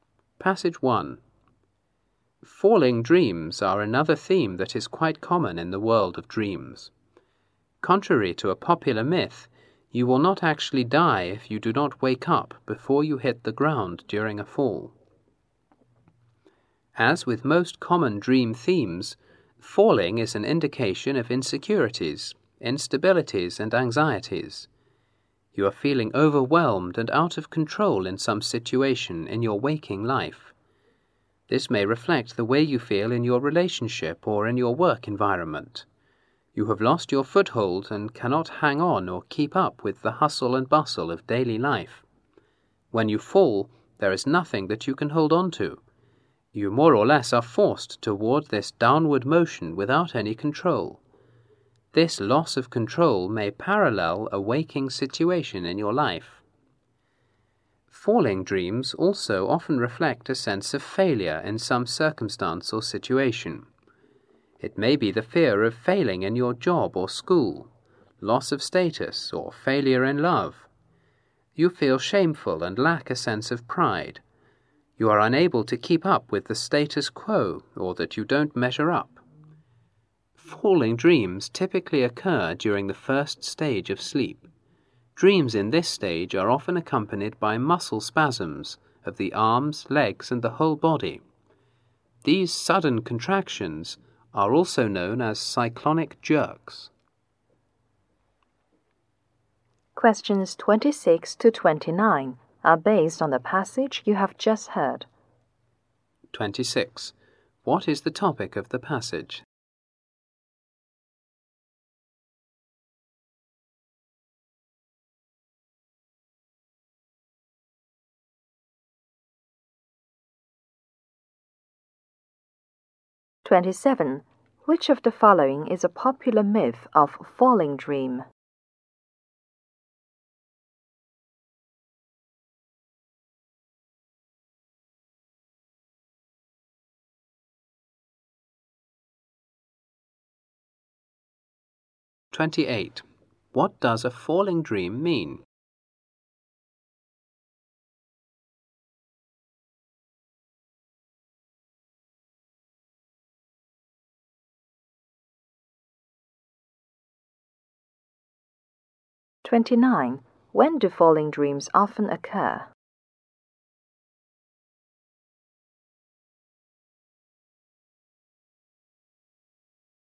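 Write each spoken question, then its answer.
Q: What is the topic of the passage?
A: Falling dreams

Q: Which of the following is a popular myth of falling dream?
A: That you will die if you don't wake up before hitting the ground

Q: What does a falling dream mean?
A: Insecurity, instability and anxiety, or a sense of failure

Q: When do falling dreams often occur?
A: During the first stage of sleep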